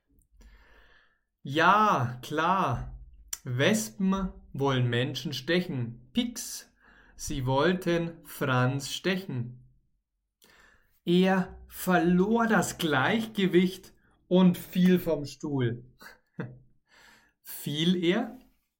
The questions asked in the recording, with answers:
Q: Fiel er?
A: Ja, genau, er fiel vom Stuhl.